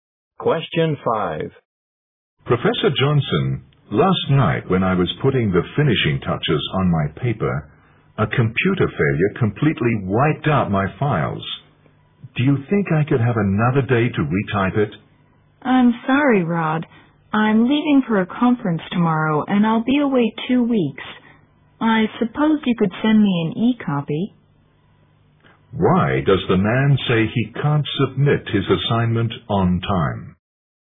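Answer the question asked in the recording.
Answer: A computer failure wiped out his files.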